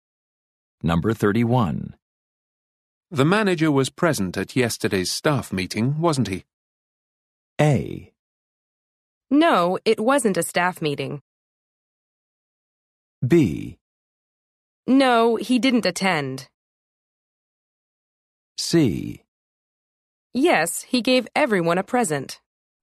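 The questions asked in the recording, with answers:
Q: The manager was present at yesterday's staff meeting, wasn't he?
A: B: No, he didn't attend.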